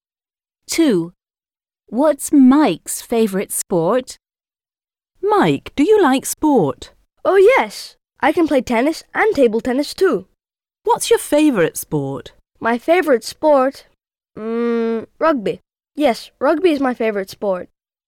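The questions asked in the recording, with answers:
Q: What's Mike's favourite sport?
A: rugby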